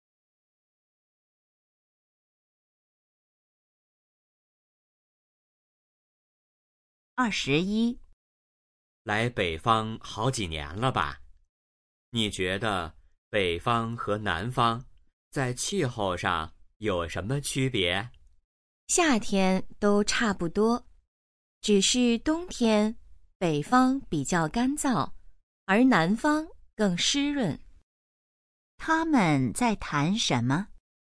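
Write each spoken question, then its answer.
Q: 他们在谈什么?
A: 北方和南方的气候区别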